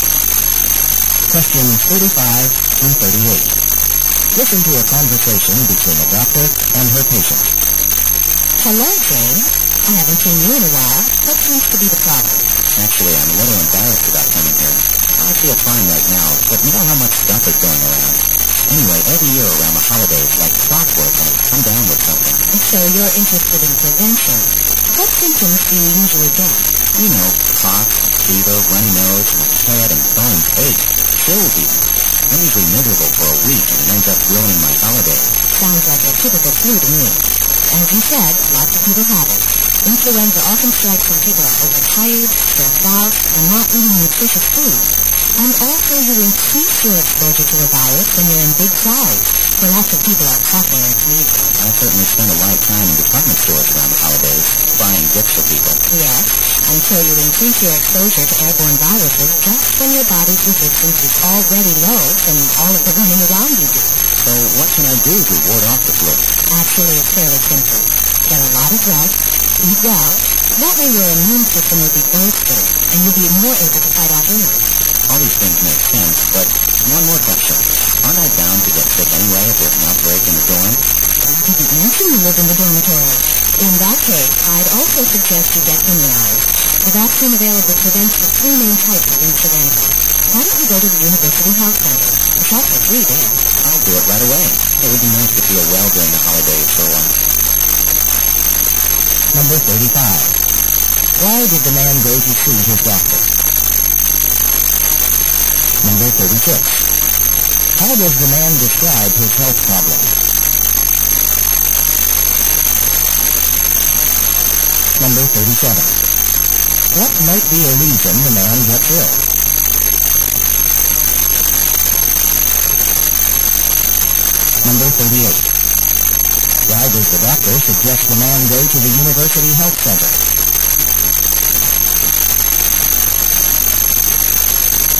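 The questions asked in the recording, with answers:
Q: Why did the man go to see his doctor?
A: To find out how to avoid getting the flu

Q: How does the man describe his health problems?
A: Every holiday season they get flu symptoms like cough, fever and aches

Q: What might be a reason the man gets ill?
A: Being overtired and stressed and in crowds during the holidays

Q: Why does the doctor suggest the man go to the University Health Center?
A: The flu vaccine is free there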